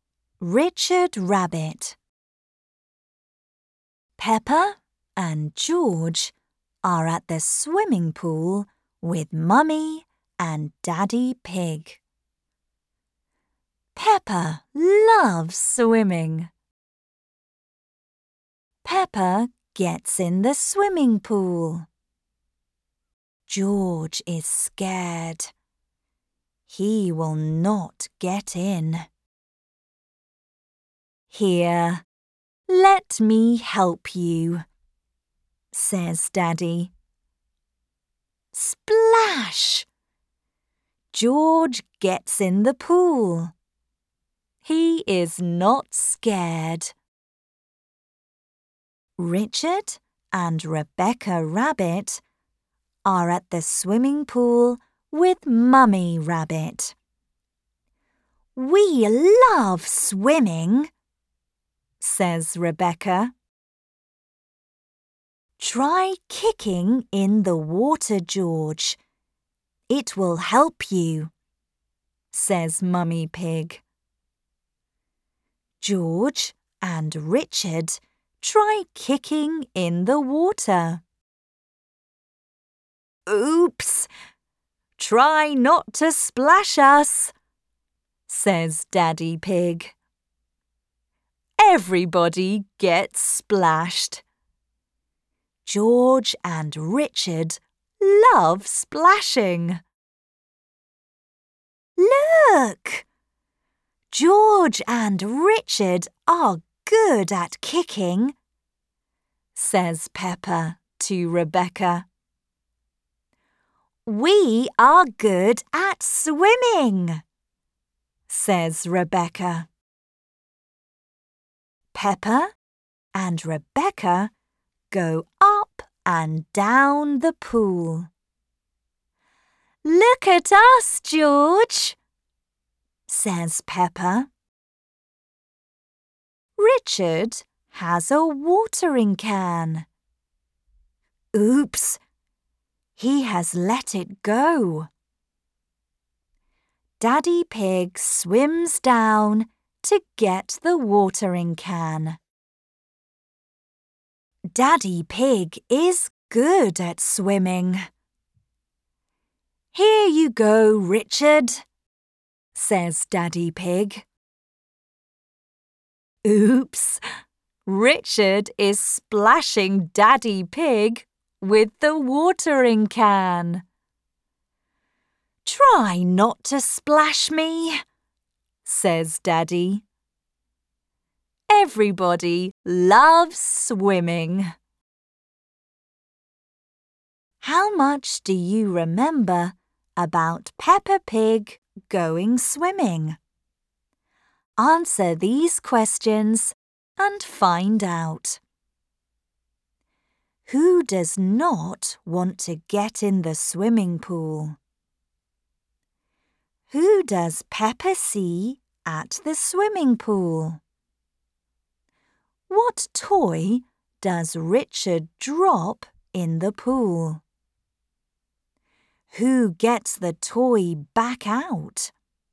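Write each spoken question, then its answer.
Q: Who does not want to get in the swimming pool?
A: George

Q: Who does Peppa see at the swimming pool?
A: Rebecca and Richard Rabbit

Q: What toy does Richard drop in the pool?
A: A watering can

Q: Who gets the toy back out?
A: Daddy Pig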